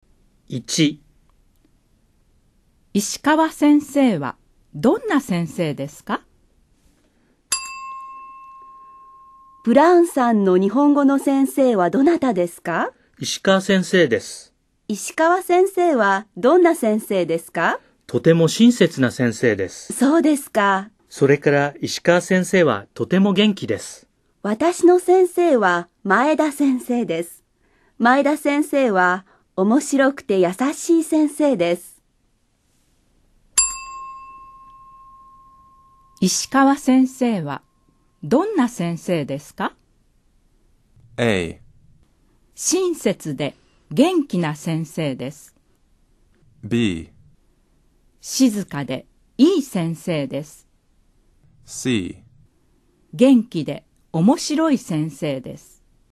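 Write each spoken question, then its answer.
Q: 石川先生はどんな先生ですか?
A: A: 親切で元気な先生です。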